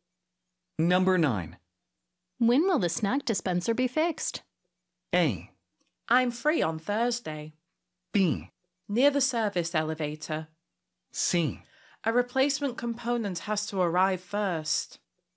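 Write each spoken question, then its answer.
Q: When will the snack dispenser be fixed?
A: C: A replacement component has to arrive first.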